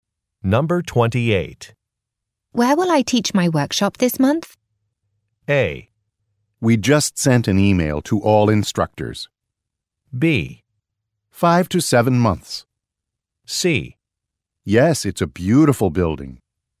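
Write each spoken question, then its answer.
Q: Where will I teach my workshop this month?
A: A: We just sent an email to all instructors.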